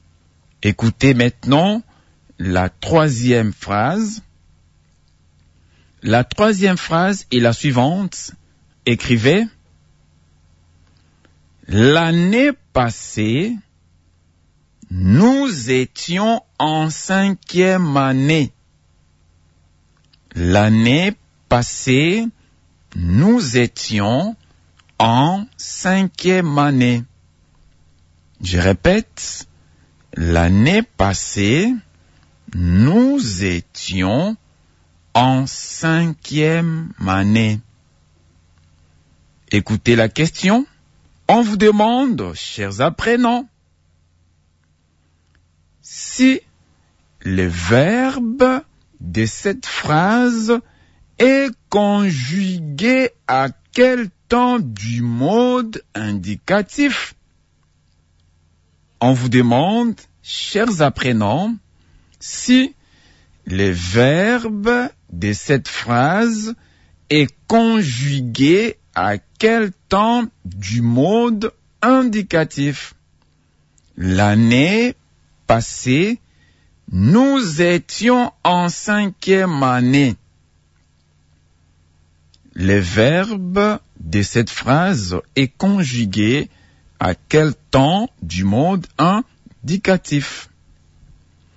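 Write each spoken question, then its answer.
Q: Le verbe de cette phrase est conjugué à quel temps du mode indicatif?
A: À l'imparfait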